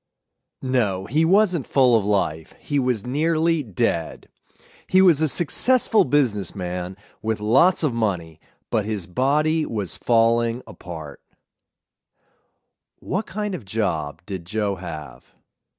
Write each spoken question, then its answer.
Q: What kind of job did Joe have?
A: He was a successful businessman.